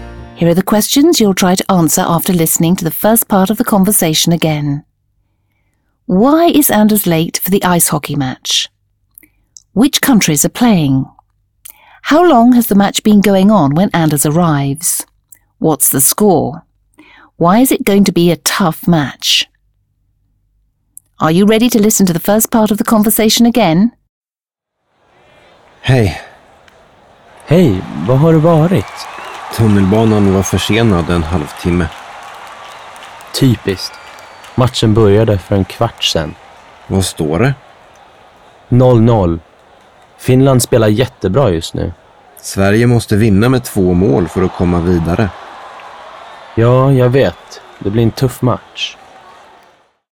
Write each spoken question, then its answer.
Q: Why is Anders late for the ice hockey match?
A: He's late because the train was half an hour delayed.

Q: Which countries are playing?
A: Sweden is playing Finland.

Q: How long has the match been going on when Anders arrives?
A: The match started a quarter of an hour ago.

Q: What's the score?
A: The score is 0-0 at the moment.

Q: Why is it going to be a tough match?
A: The match is going to be tough because Finland is playing very well at the moment and because Sweden has to beat Finland by 2 goals to advance.